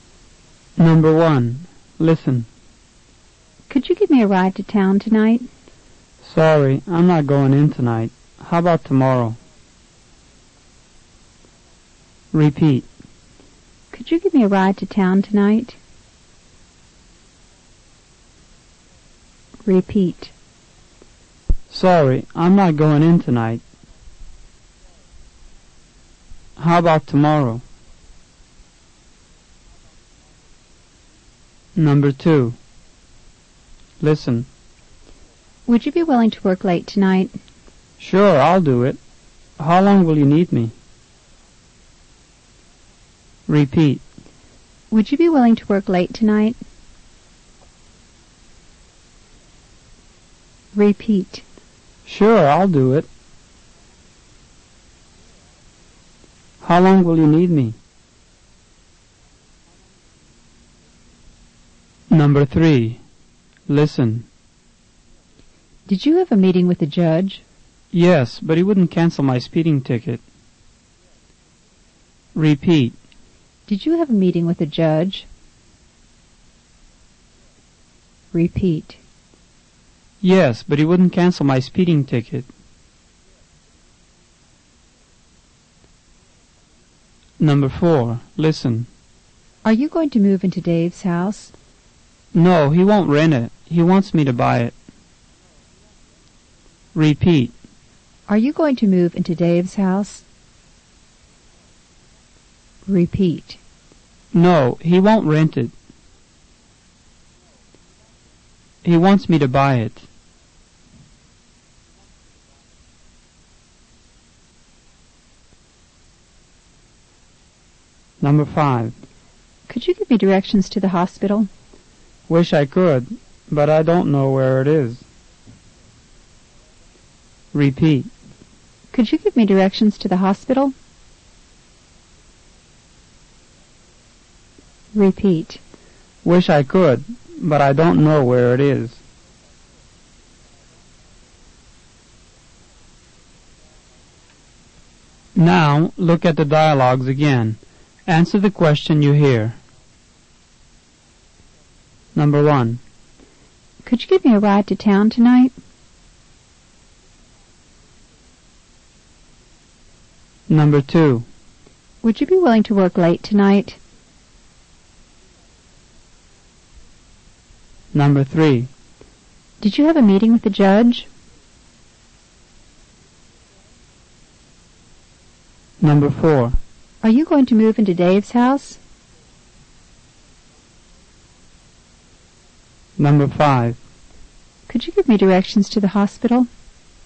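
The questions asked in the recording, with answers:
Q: Could you give me a ride to town tonight?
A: Sorry, I'm not going in tonight. How about tomorrow?

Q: Would you be willing to work late tonight?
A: Sure, I'll do it.

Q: Did you have a meeting with the judge?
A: Yes, but he wouldn't cancel my speeding ticket.

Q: Are you going to move into Dave's house?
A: No, he won't rent it. He wants me to buy it.

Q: Could you give me directions to the hospital?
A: Wish I could, but I don't know where it is.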